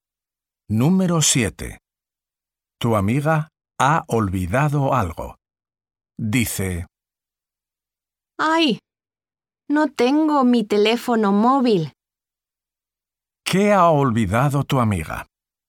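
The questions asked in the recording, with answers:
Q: ¿Qué ha olvidado tu amiga?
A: su teléfono móvil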